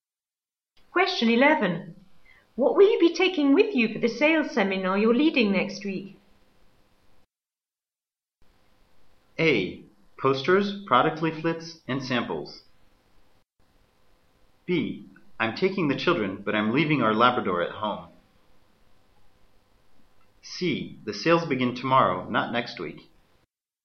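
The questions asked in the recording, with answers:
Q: What will you be taking with you for the sales seminar you're leading next week?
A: A: Posters, product leaflets, and samples.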